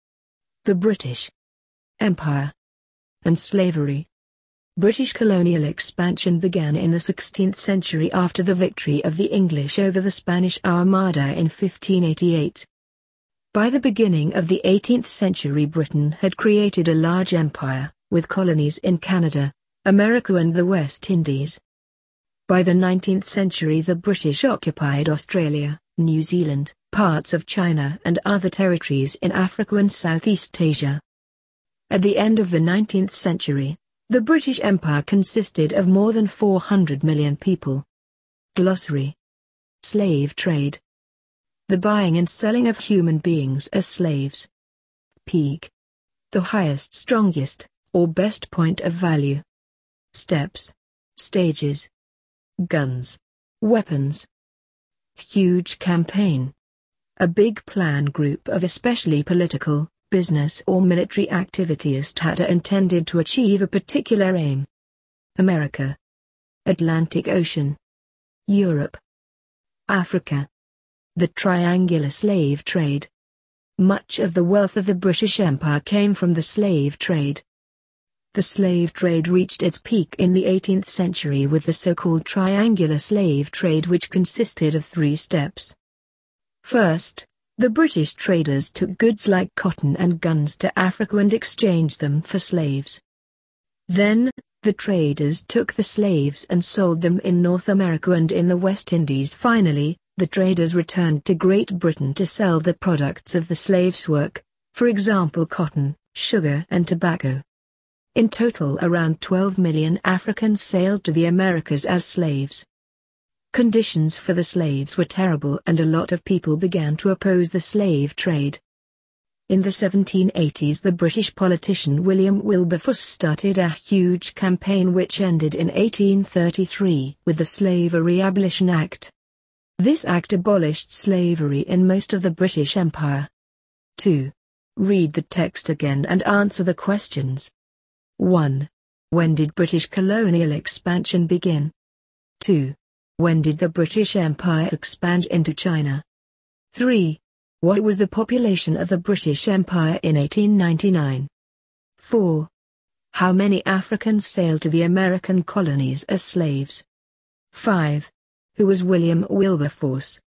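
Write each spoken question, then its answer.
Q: When did British colonial expansion begin?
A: In the 16th century, after the victory over the Spanish Armada in 1588

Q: When did the British Empire expand into China?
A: By the 19th century

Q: What was the population of the British Empire in 1899?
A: More than 400 million people

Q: How many Africans sailed to the American colonies as slaves?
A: Around 12 million

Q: Who was William Wilberforce?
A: A British politician who started a huge campaign against the slave trade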